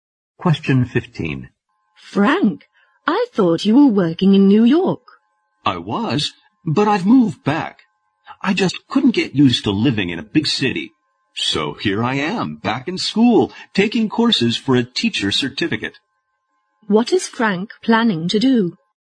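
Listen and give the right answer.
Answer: Become a teacher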